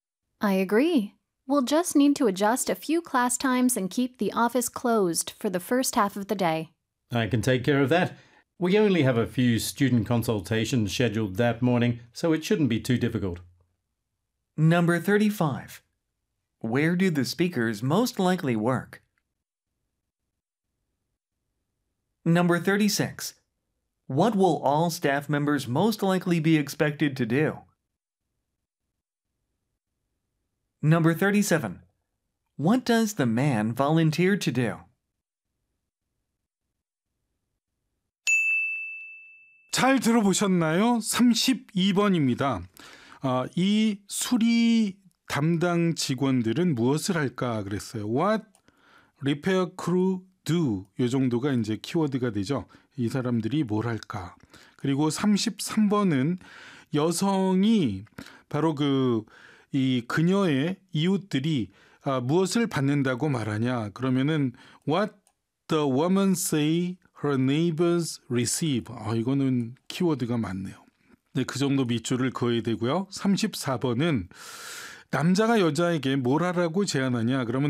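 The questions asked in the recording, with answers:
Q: Where do the speakers most likely work?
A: At a language school (TOEIC)

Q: What will all staff members most likely be expected to do?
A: Attend a communication workshop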